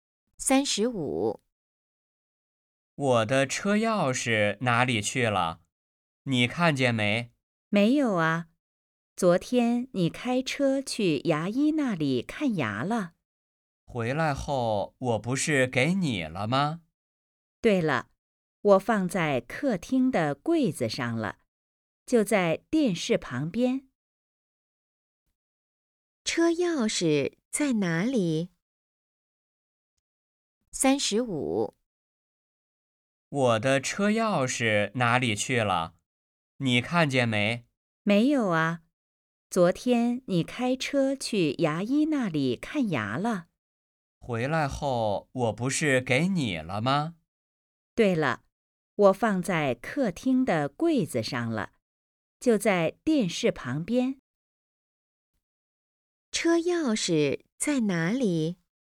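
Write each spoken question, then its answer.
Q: 车钥匙在哪里?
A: 客厅的柜子上,电视旁边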